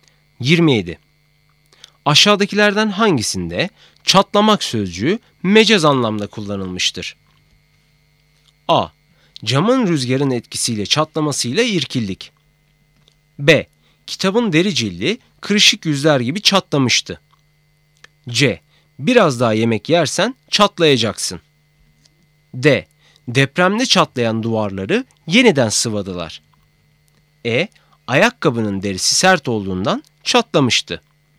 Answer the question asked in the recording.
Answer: Doğru cevap C. Biraz daha yemek yersen çatlayacaksın.